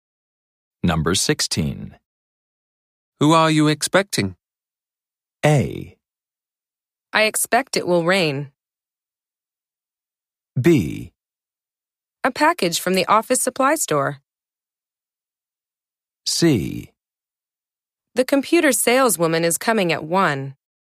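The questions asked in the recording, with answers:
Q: Who are you expecting?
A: C: The computer saleswoman is coming at 1.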